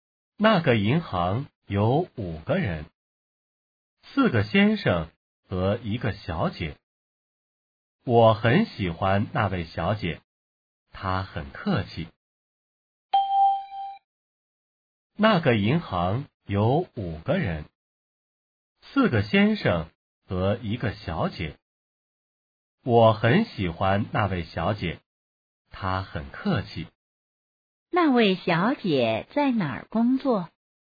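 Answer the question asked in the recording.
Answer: 在银行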